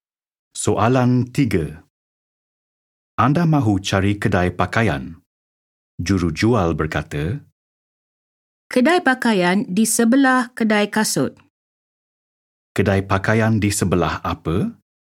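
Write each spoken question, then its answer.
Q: Kedai pakaian di sebelah apa?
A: Kedai kasut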